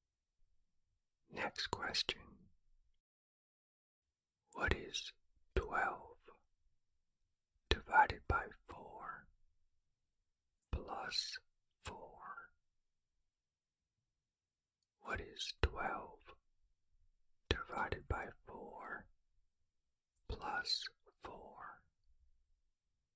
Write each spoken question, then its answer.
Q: What is 12 divided by 4 plus 4?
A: The answer is 7.